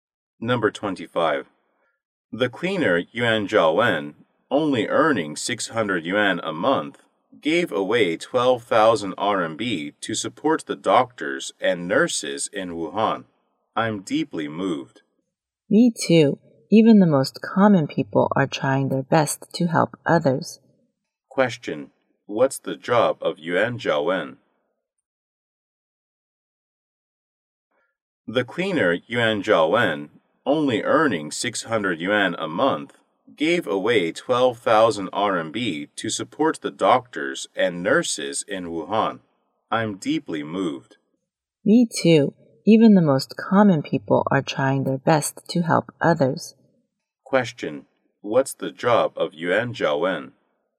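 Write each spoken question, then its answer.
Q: What's the job of Yuan Zhaowen?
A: A cleaner.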